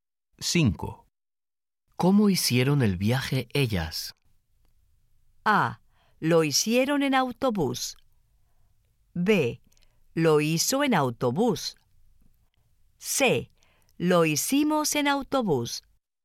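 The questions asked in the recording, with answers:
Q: ¿Cómo hicieron el viaje ellas?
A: A: Lo hicieron en autobús.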